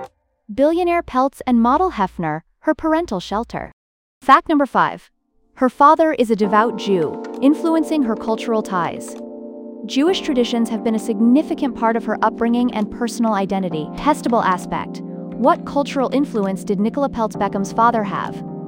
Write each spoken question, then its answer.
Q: What cultural influence did Nicola Peltz Beckham's father have?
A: Jewish.